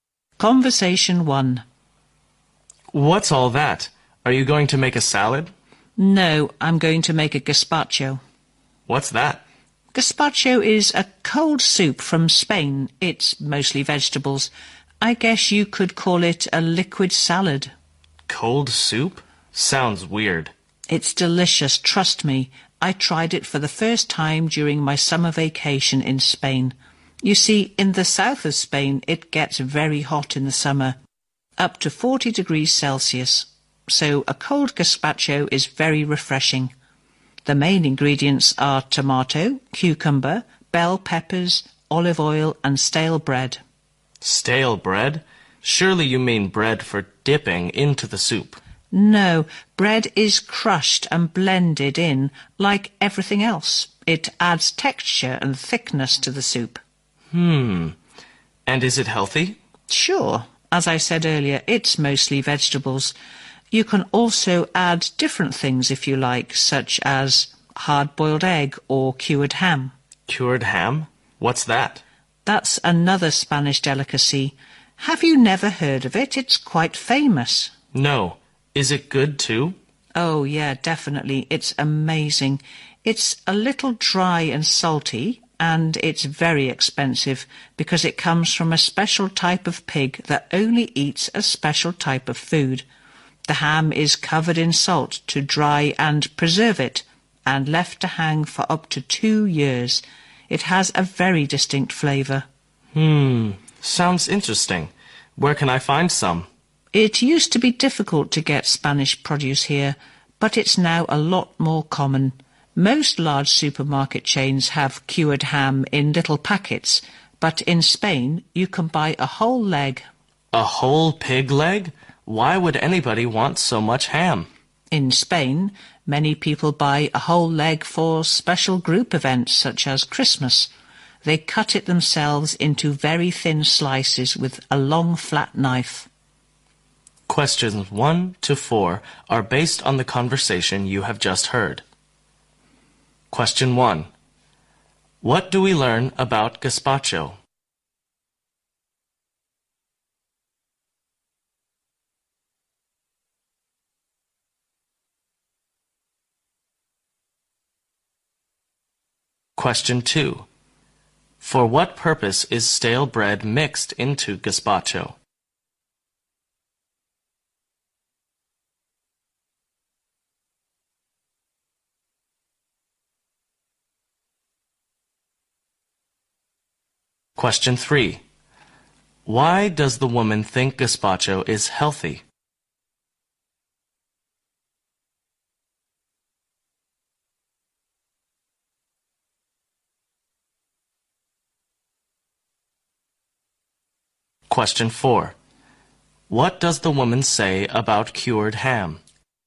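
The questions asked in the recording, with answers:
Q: For what purpose is stale bread mixed into gazpacho?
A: To add texture and thickness

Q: Why does the woman think gazpacho is healthy?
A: It is mostly vegetables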